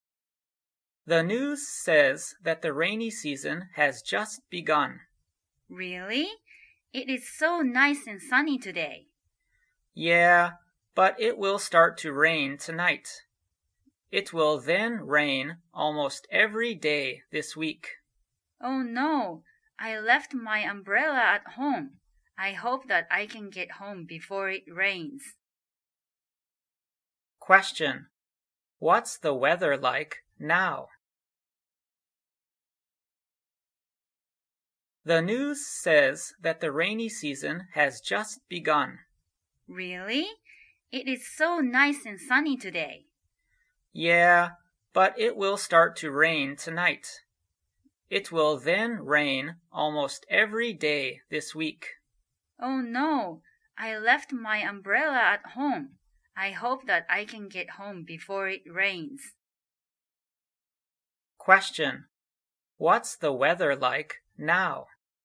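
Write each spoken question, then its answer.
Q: What's the weather like now?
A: It is nice and sunny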